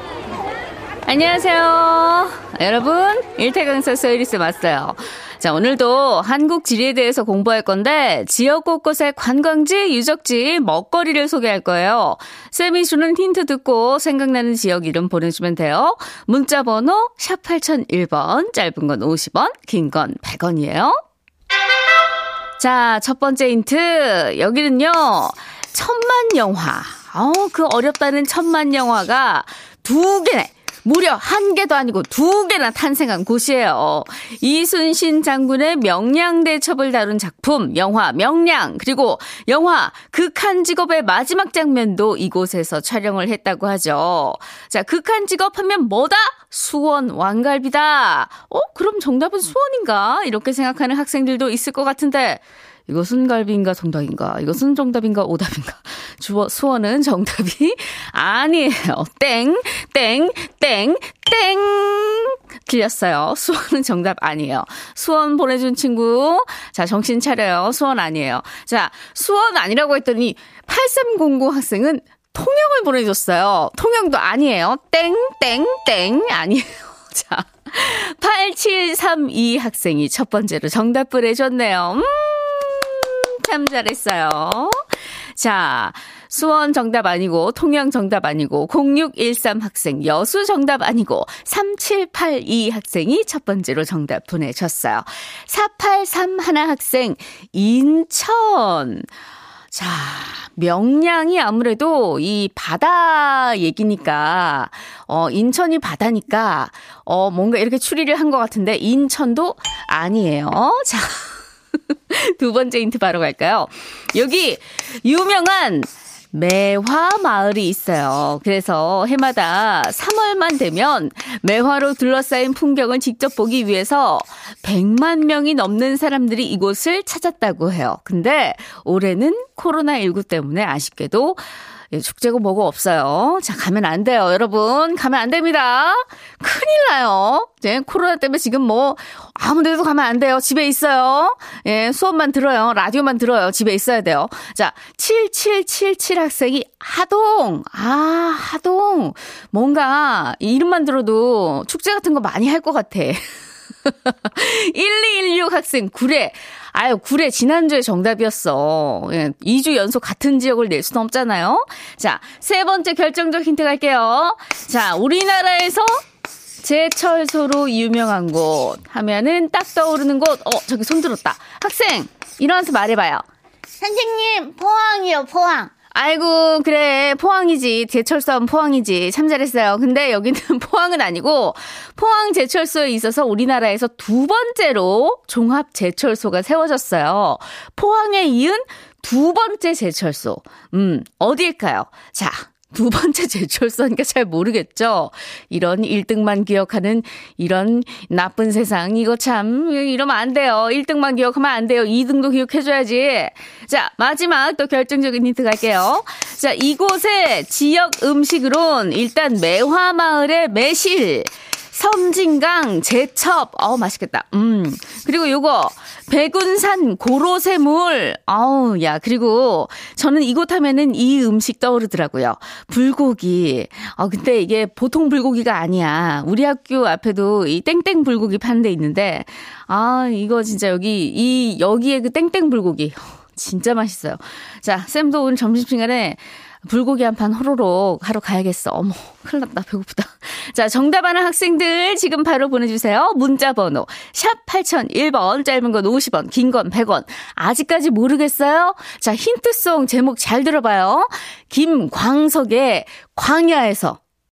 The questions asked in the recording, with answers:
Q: 포항에 이은 두 번째 제철소. 음, 어디일까요?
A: 정답은 전라남도 광양이었습니다.